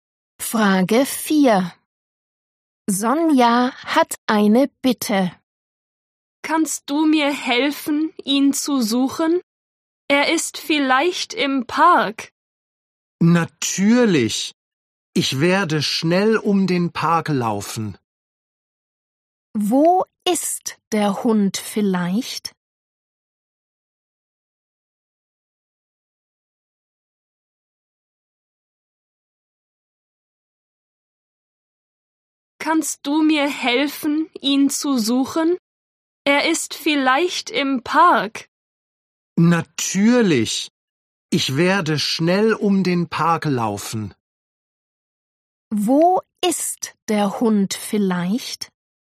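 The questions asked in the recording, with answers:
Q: Wo ist der Hund vielleicht?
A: im Park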